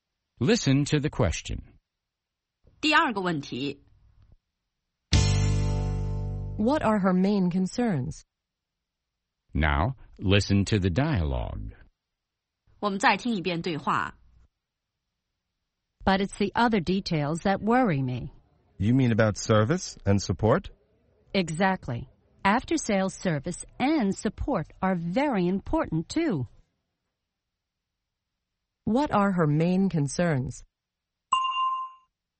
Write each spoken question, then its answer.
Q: What are her main concerns?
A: Her main concerns are after-sales service and support.